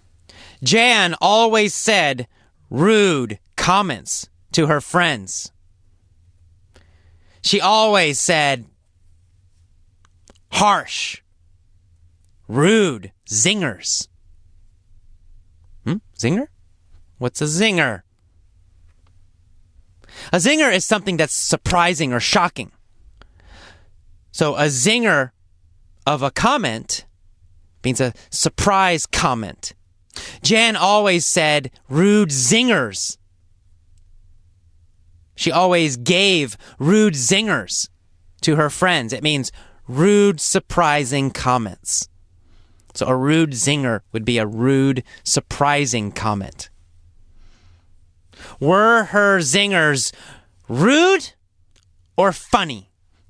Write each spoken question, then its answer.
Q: Were her zingers rude or funny?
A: Her zingers were rude.